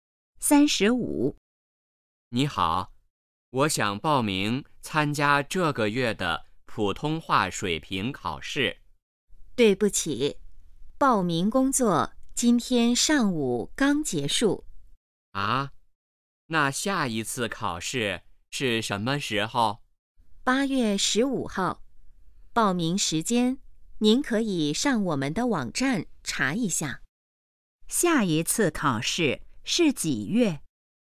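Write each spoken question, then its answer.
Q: 下一次考试是几月?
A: 8月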